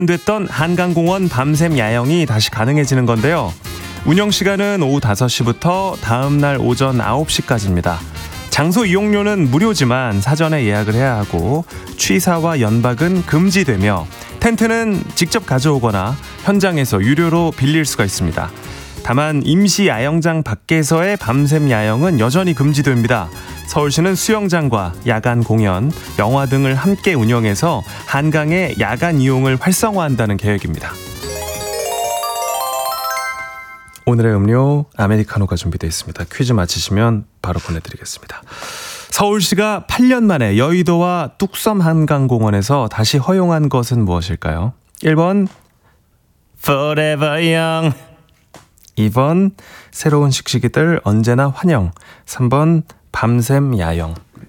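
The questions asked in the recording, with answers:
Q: 서울시가 8년 만에 여의도와 뚝섬 한강공원에서 다시 허용한 것은 무엇일까요?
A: 3번: 밤샘 야영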